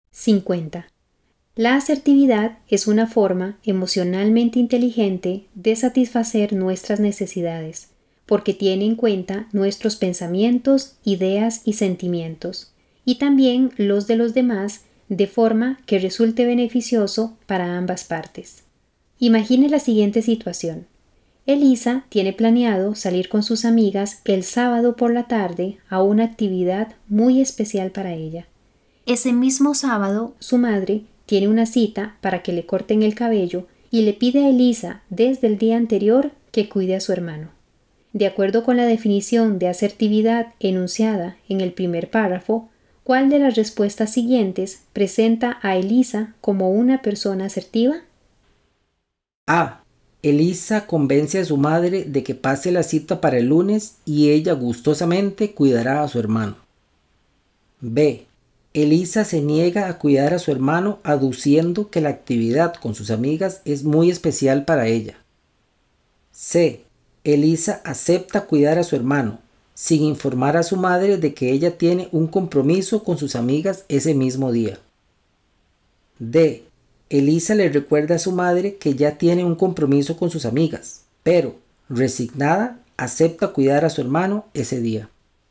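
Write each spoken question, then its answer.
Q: De acuerdo con la definición de asertividad enunciada en el primer párrafo, ¿cuál de las respuestas siguientes presenta a Elisa como una persona asertiva?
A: A: Elisa convence a su madre de que pase la cita para el lunes y ella gustosamente cuidará a su hermano.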